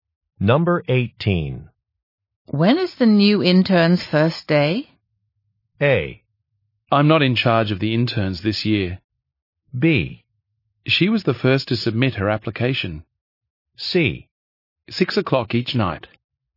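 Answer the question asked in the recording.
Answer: A: I'm not in charge of the interns this year.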